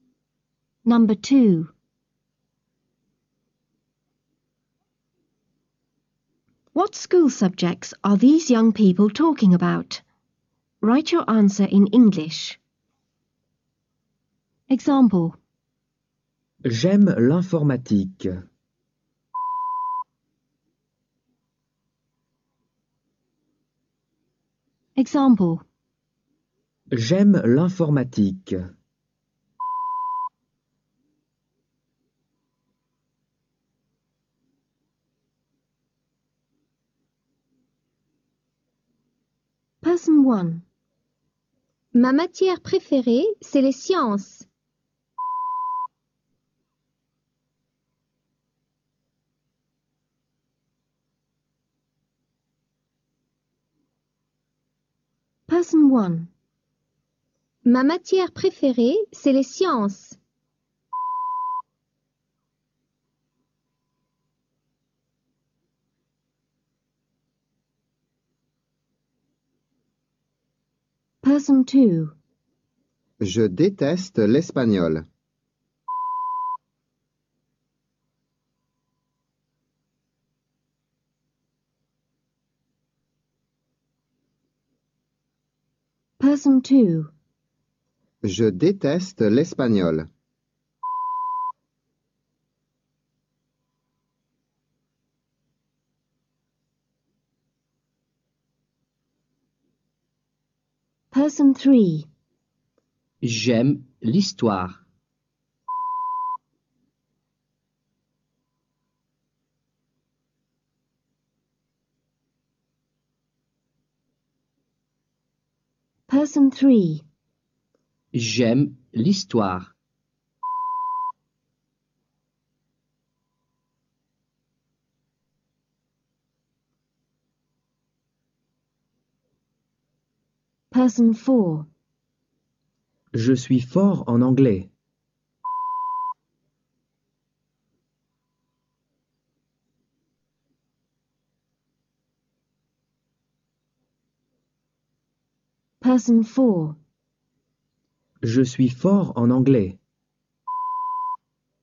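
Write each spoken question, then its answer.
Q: What school subjects are these young people talking about?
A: Science

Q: What school subjects are these young people talking about?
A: Spanish

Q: What school subjects are these young people talking about?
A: History

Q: What school subjects are these young people talking about?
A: English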